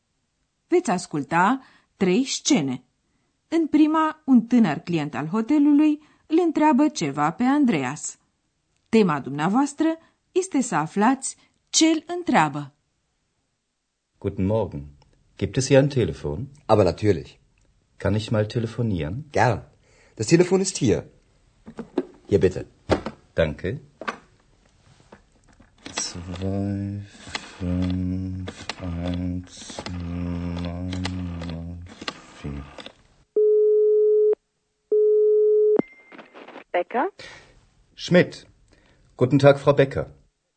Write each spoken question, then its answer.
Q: Tema dumneavoastră este să aflați ce îl întreabă.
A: Ați înțeles probabil că tânărul vrea să telefoneze.